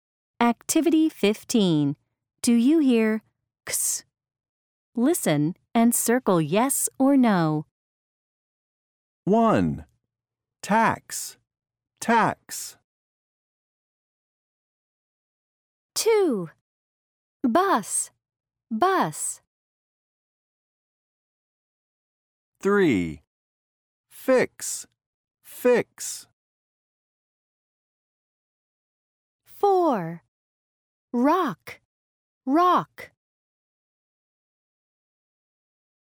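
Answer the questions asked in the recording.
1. yes
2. no
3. yes
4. no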